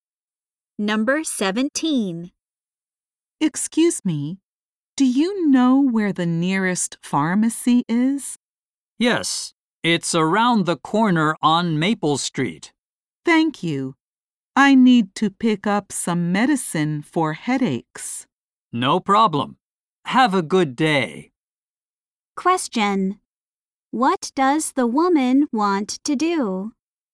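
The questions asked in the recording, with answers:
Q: What does the woman want to do?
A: Get medicine for headaches at a pharmacy.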